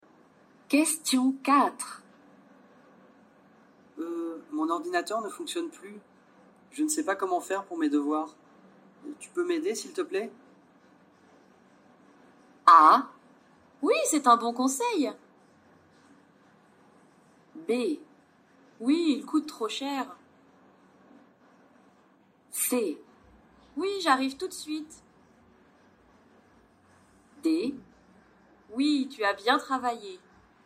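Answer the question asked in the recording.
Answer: C: Oui, j'arrive tout de suite.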